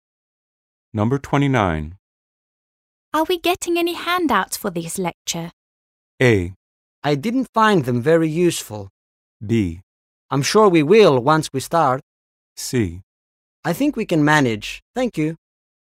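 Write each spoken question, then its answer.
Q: Are we getting any handouts for this lecture?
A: B: I'm sure we will once we start.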